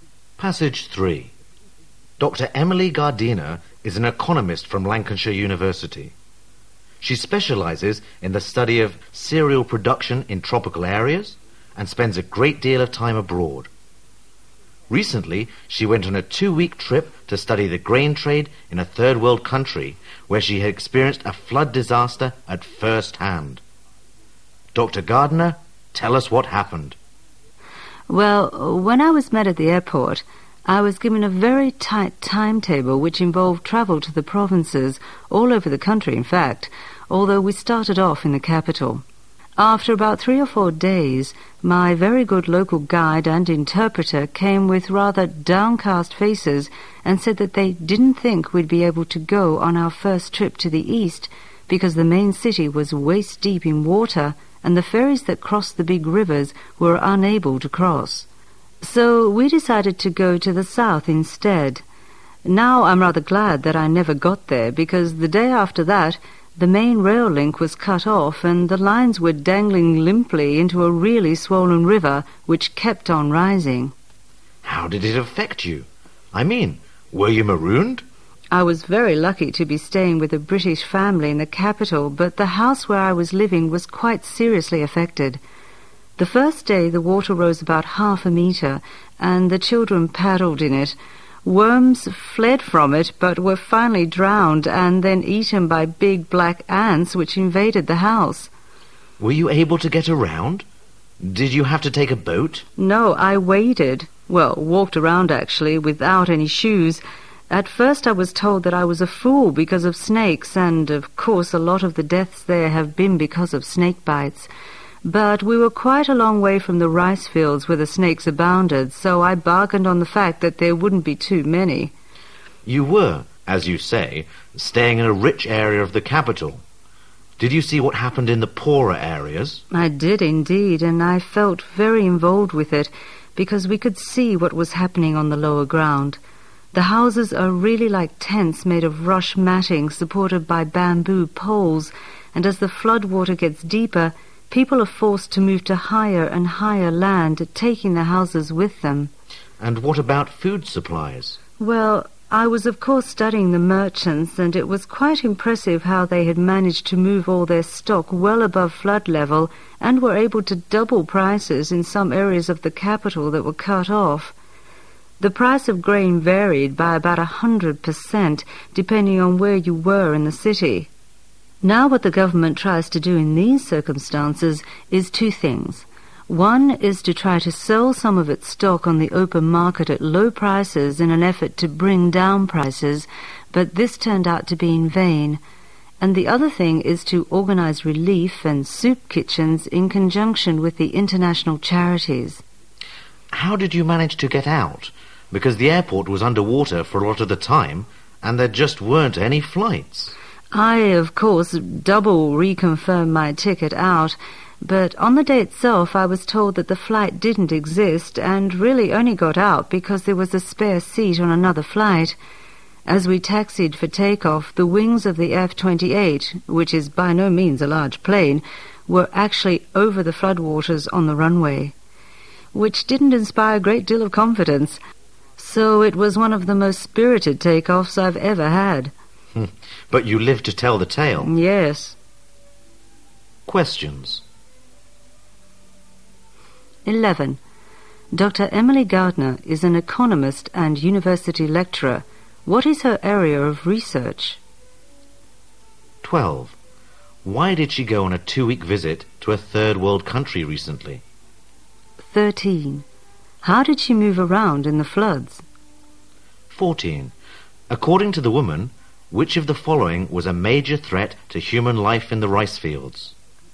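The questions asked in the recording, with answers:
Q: Dr. Emily Gardner is an economist and university lecturer. What is her area of research?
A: Cereal production in tropical areas

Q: Why did she go on a 2-week visit to a third world country recently?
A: To study the grain trade

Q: How did she move around in the floods?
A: She waded, walking around without shoes

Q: According to the woman, which of the following was a major threat to human life in the rice fields?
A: Snake bites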